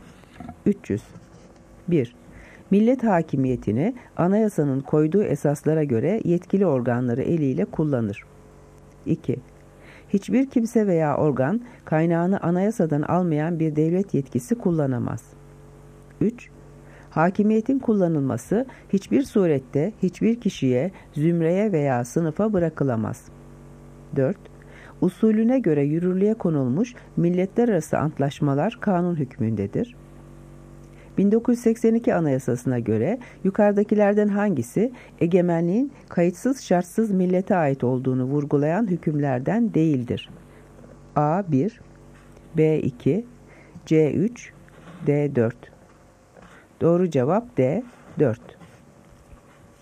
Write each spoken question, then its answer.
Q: 1982 Anayasası'na göre yukarıdakilerden hangisi egemenliğin kayıtsız şartsız millete ait olduğunu vurgulayan hükümlerden değildir?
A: Doğru cevap D. 4